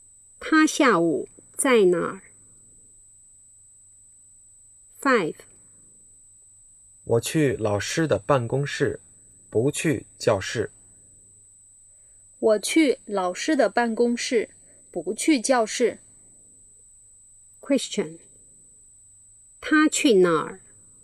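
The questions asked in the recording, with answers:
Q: 他去哪儿?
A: 老师的办公室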